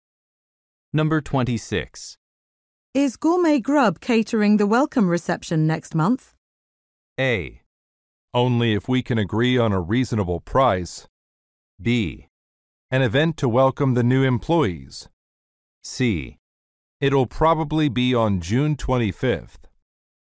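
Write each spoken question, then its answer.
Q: Is Gourmet Grub catering the welcome reception next month?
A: A: Only if we can agree on a reasonable price.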